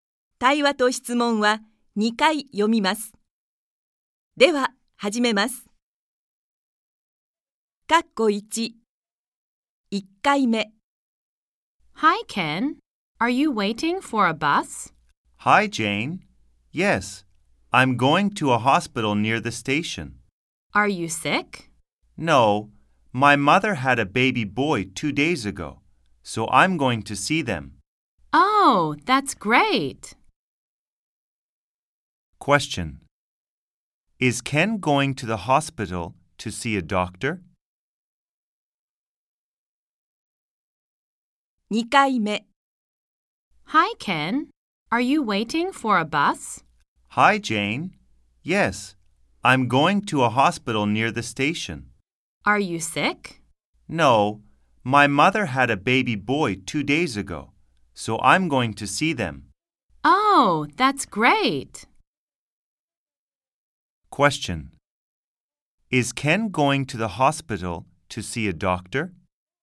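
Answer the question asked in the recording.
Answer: No, he is going to see his mother and baby brother.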